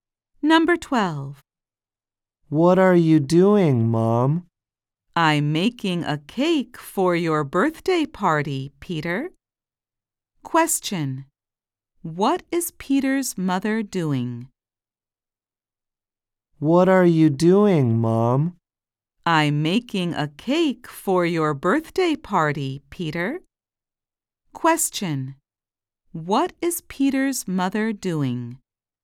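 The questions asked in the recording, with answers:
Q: What is Peter's mother doing?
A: Making a cake for Peter's birthday party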